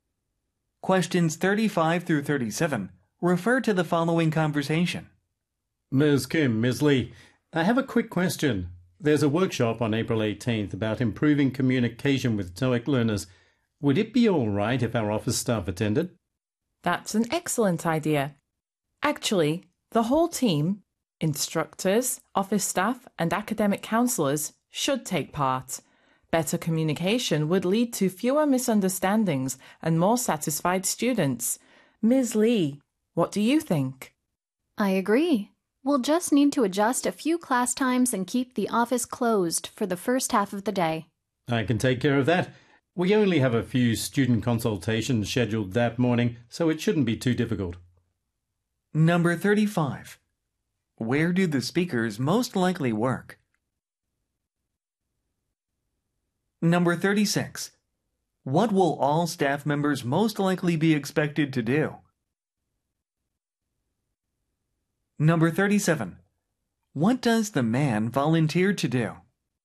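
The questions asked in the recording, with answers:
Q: Where do the speakers most likely work?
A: At a language school (TOEIC)

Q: What will all staff members most likely be expected to do?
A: Attend a communication workshop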